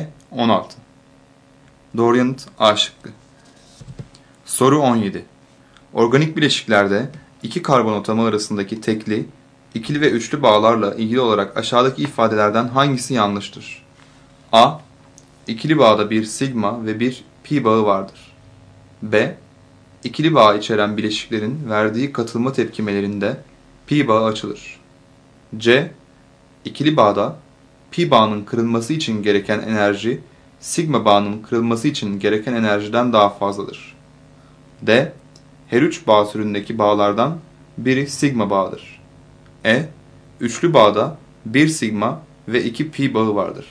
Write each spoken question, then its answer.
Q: Organik bileşiklerde iki karbon atomu arasındaki tekli, ikili ve üçlü bağlarla ilgili olarak aşağıdaki ifadelerden hangisi yanlıştır?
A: Doğru yanıt C şıkkı.